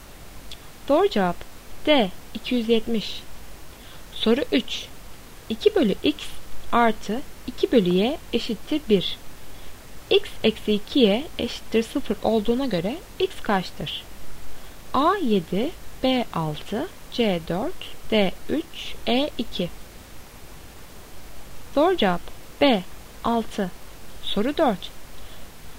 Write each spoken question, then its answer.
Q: X eksi 2y eşittir 0 olduğuna göre x kaçtır?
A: Doğru cevap B 6.